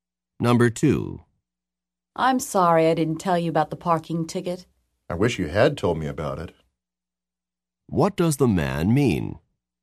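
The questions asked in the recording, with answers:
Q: What does the man mean?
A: The woman didn't tell him about the parking ticket.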